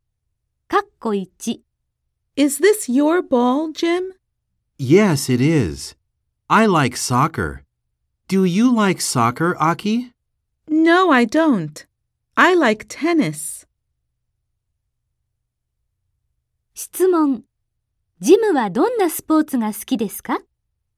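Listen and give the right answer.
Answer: サッカー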